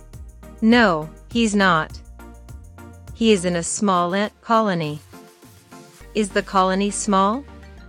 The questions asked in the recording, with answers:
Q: Is the colony small?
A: Yes, it is. It's a small, busy colony.